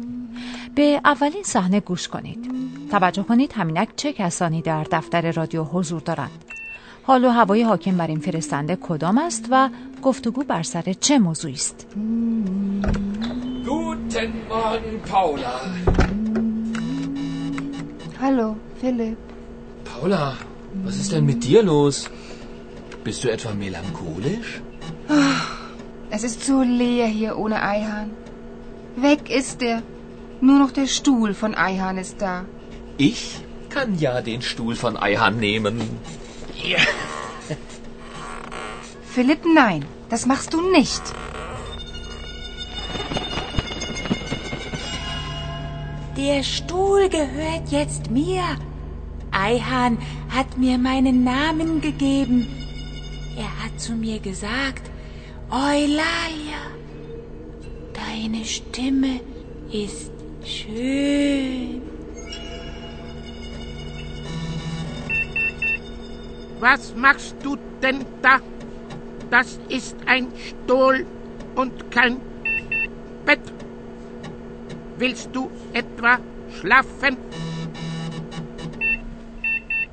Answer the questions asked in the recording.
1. شما ابتدا در دفتر رادیو صدای دو خبرنگار رادیو د یعنی پالا و فیلیپ را شنیدید.
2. به نظر می رسد که پالا از رفتن آیهان اندکی غمگین است، اما در مقابل فیلیپ کاملا سرحال به نظر می رسد و موضوع گفتگو هم بر سر یک شتول یعنی صندلی است.